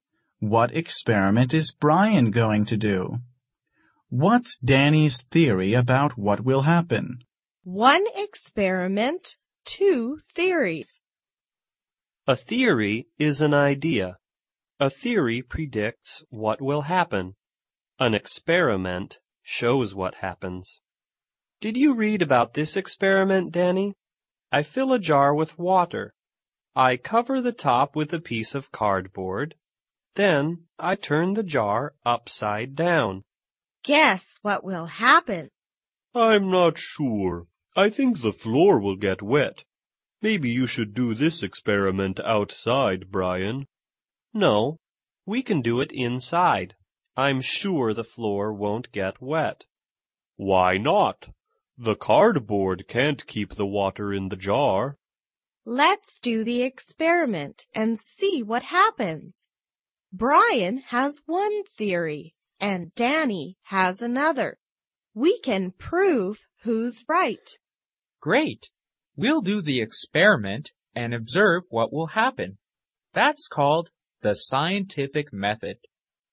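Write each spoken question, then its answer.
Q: What experiment is Brian going to do?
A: Fill a jar with water, cover the top with cardboard, and turn it upside down

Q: What's Danny's theory about what will happen?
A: The floor will get wet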